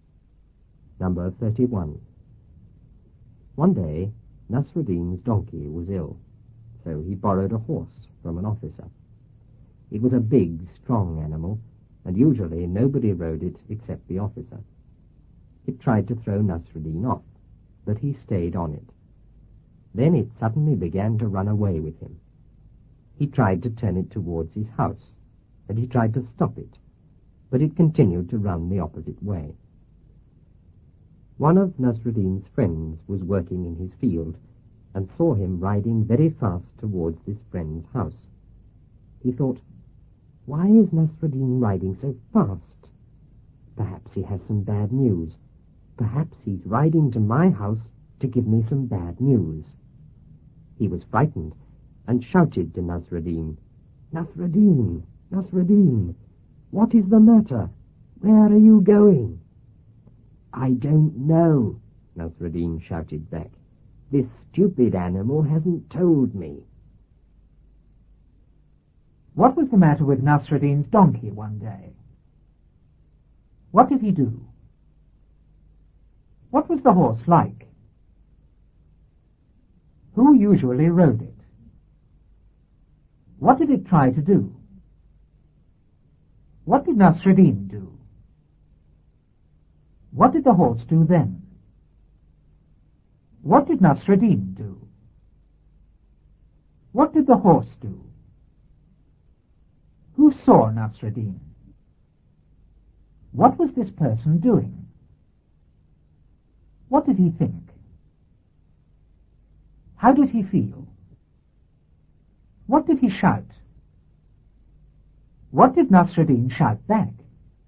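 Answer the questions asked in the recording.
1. It was ill.
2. He borrowed a horse from an officer.
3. Big and strong.
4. Only the officer.
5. To throw Nasruddin off.
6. He stayed on it.
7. It suddenly ran away with him.
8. He tried to turn it towards his house and to stop it.
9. It continued to run the opposite way.
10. One of his friends.
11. Working in his field.
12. That Nasruddin was riding to his house with bad news.
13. Frightened.
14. "Nasruddin, what is the matter? Where are you going?"
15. "I don't know. This stupid animal hasn't told me."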